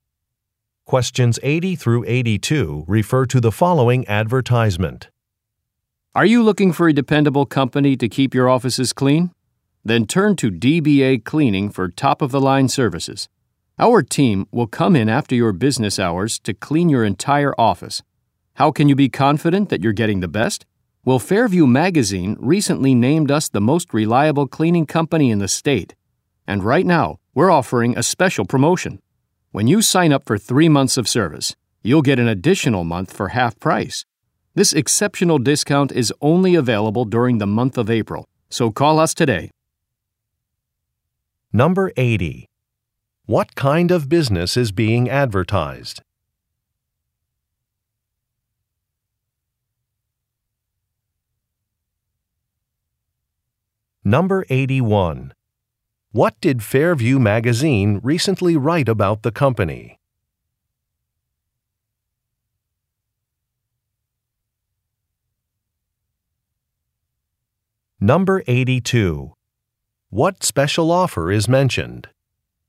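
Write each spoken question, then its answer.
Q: What kind of business is being advertised?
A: An office cleaning company

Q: What did Fairview Magazine recently write about the company?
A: It is the most reliable cleaning company in the state

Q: What special offer is mentioned?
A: An extra month at half price with 3 months of service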